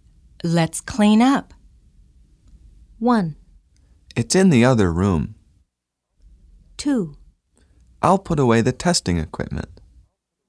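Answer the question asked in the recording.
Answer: 2: I'll put away the testing equipment.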